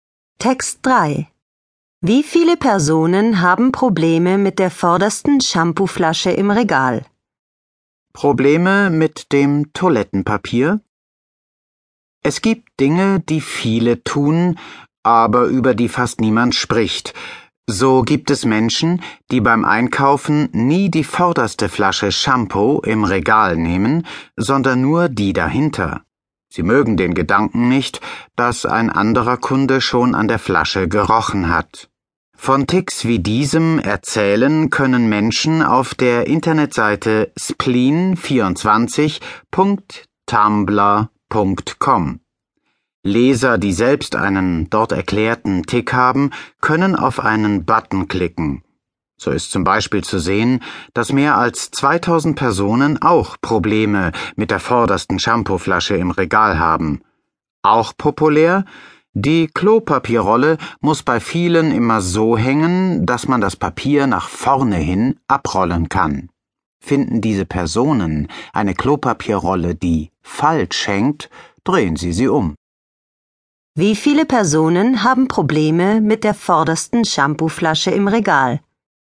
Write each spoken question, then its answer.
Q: Wie viele Personen haben Probleme mit der vordersten Shampooflasche im Regal?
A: Mehr als 2000 Personen.